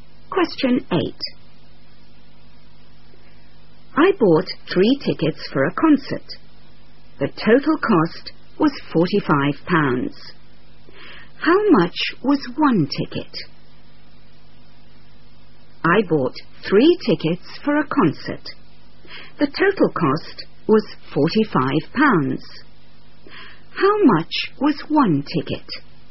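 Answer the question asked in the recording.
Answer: £15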